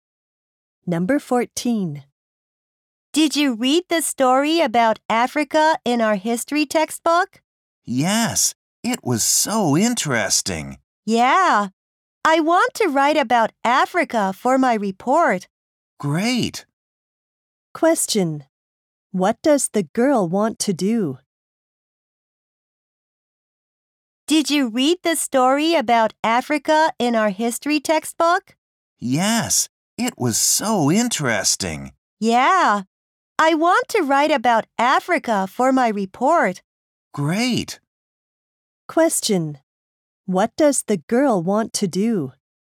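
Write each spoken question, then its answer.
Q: What does the girl want to do?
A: Write about Africa for her report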